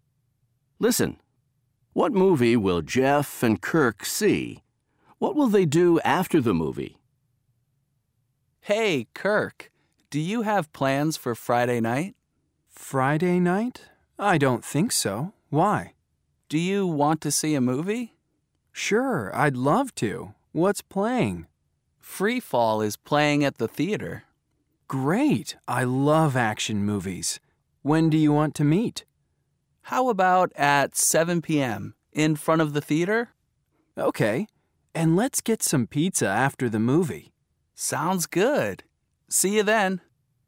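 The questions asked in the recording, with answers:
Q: What movie will Jeff and Kirk see?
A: Free Fall

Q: What will they do after the movie?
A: Get some pizza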